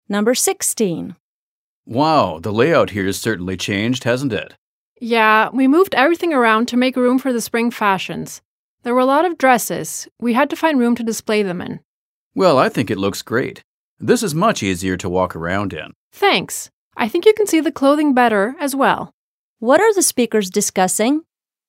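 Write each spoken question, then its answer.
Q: What are the speakers discussing?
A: The store's new layout, changed to make room for the spring fashions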